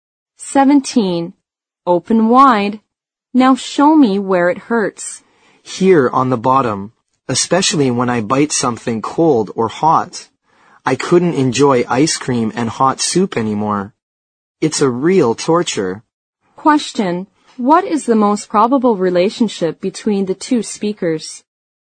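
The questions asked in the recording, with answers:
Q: What is the most probable relationship between the two speakers?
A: Dentist and patient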